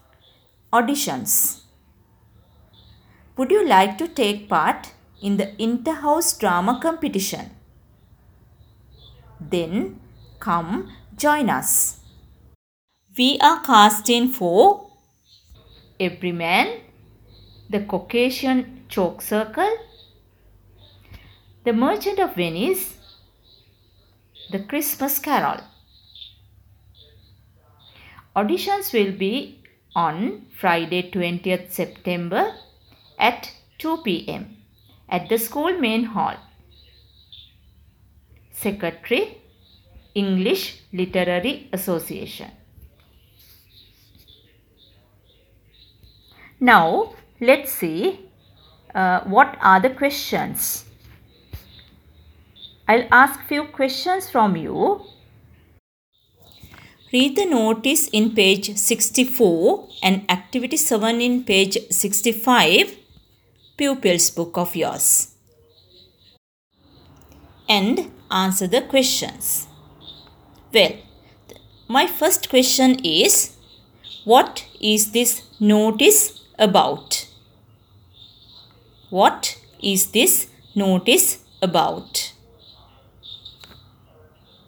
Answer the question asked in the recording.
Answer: it's an audition.